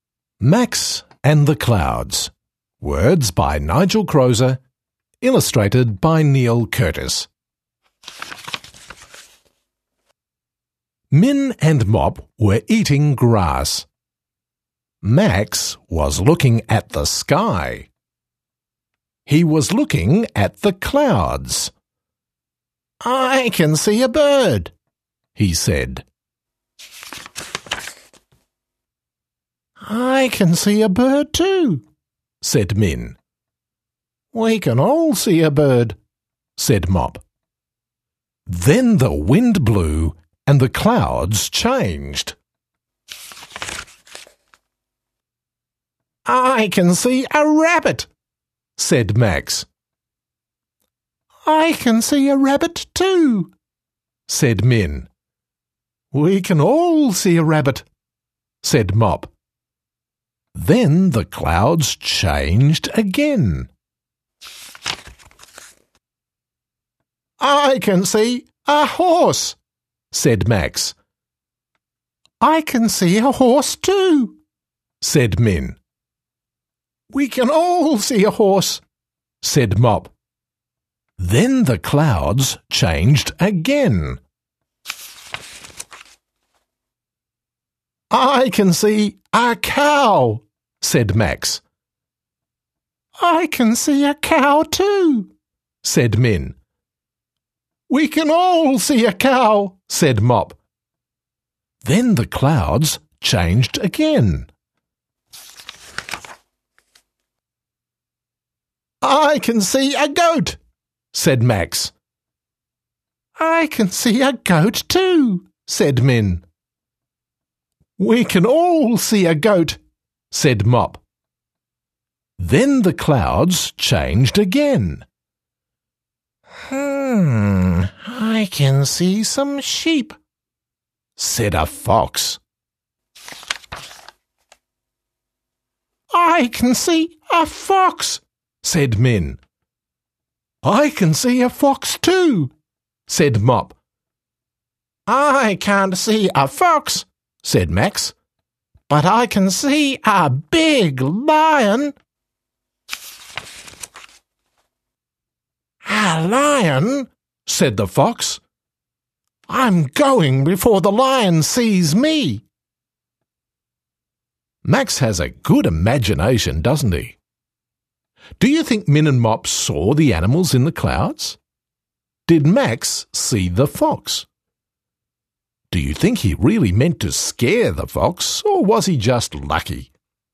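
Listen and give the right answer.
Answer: No, he saw a big lion in the clouds.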